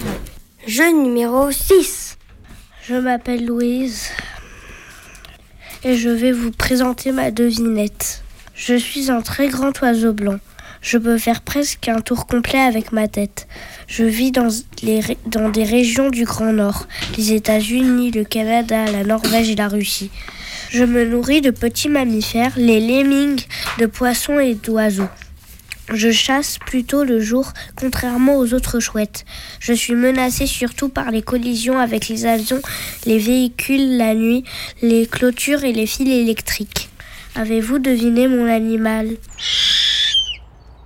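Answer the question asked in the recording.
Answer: le harfang des neiges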